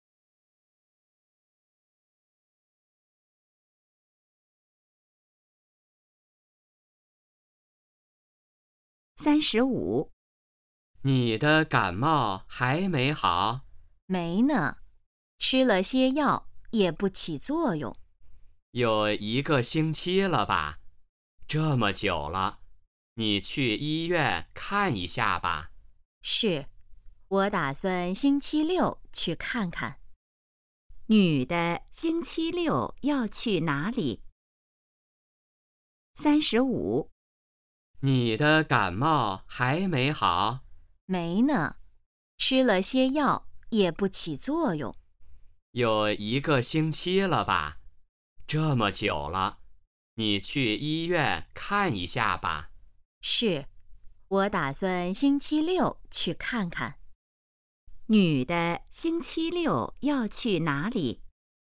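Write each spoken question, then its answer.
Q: 女的星期六要去哪里?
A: 医院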